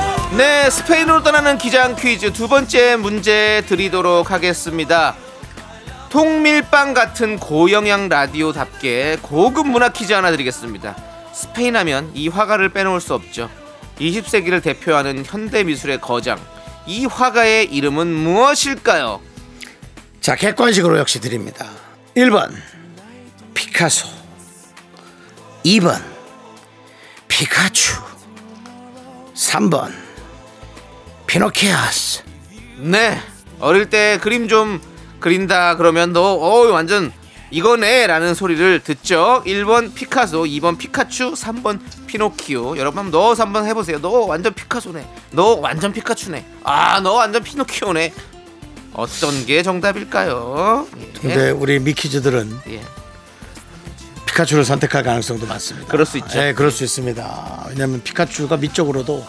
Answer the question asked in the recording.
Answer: 정답은 1번 피카소였습니다.